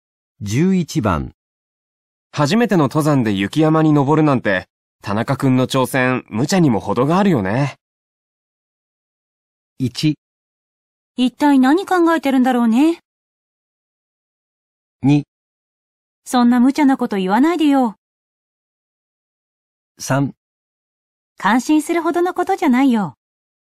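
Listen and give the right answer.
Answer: 1: 一体何考えてるんだろうね。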